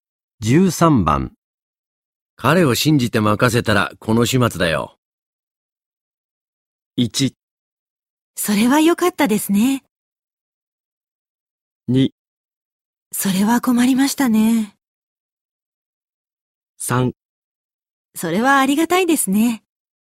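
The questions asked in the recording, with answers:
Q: 彼を信じて任せたらこの始末だよ。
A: 2: それは困りましたね。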